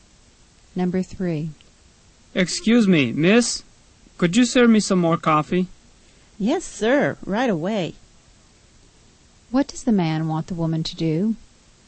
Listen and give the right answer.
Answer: He wants her to wait on him.